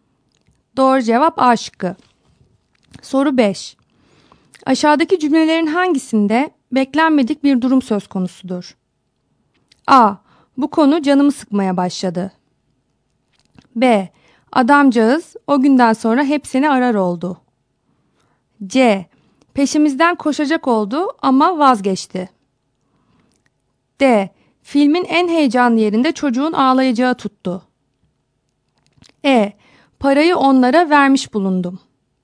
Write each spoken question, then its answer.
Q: Aşağıdaki cümlelerin hangisinde beklenmedik bir durum söz konusudur?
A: Doğru cevap D şıkkı.